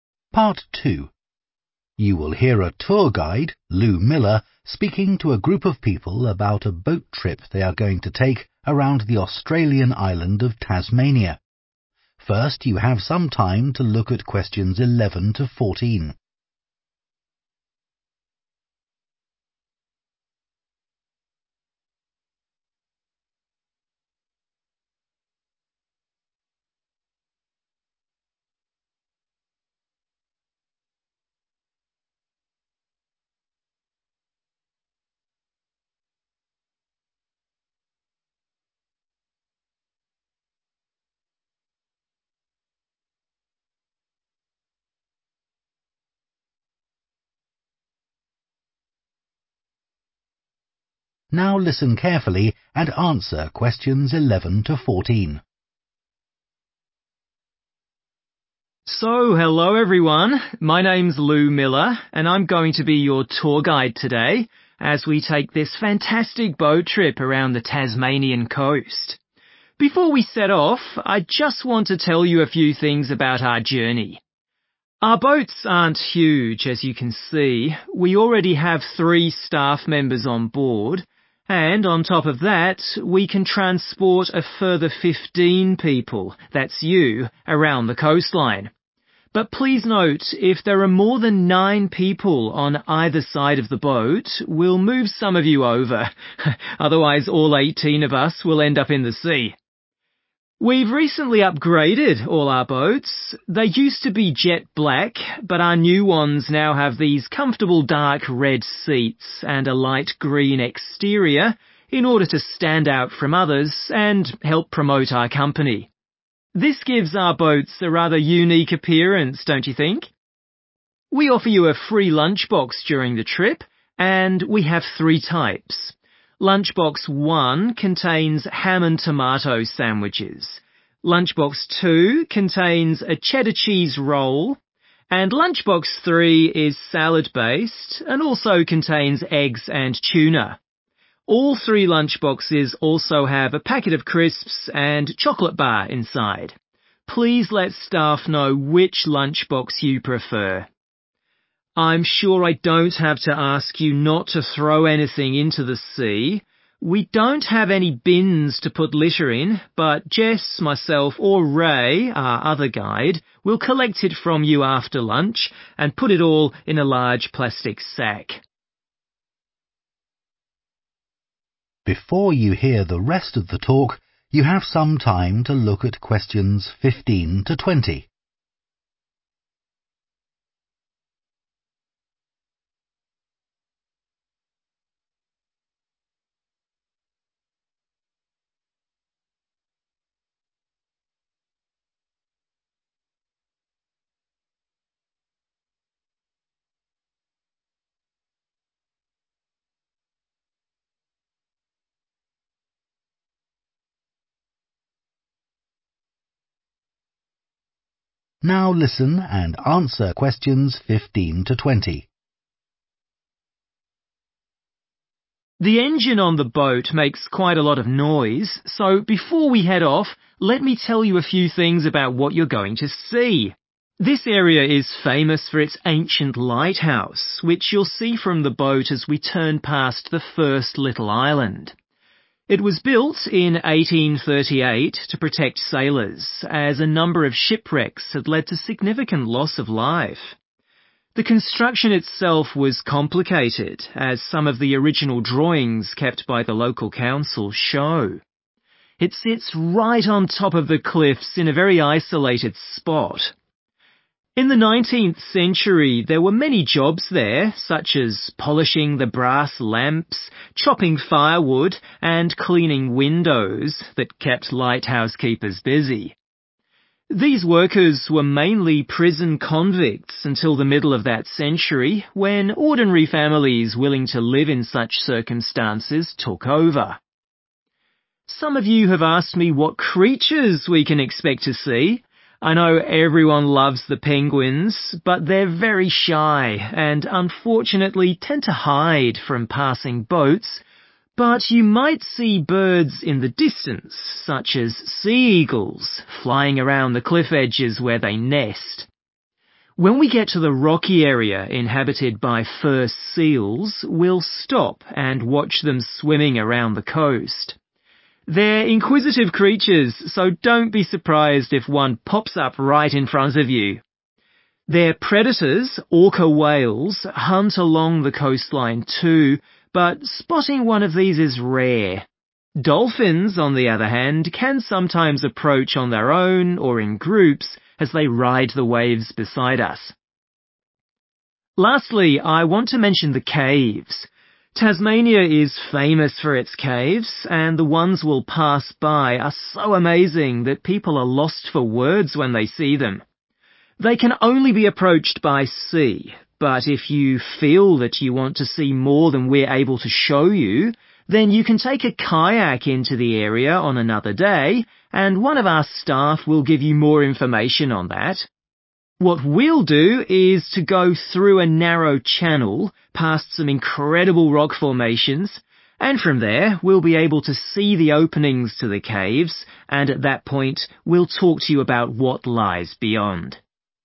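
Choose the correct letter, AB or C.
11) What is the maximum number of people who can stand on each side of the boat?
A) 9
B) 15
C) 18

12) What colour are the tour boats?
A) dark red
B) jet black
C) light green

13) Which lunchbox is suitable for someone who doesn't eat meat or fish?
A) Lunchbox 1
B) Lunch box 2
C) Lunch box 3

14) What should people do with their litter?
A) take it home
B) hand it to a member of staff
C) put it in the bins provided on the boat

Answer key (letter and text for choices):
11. A) 9
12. C) light green
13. B) Lunch box 2
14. B) hand it to a member of staff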